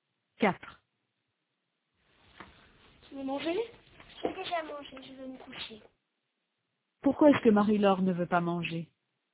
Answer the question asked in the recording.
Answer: Parce qu'elle a déjà mangé.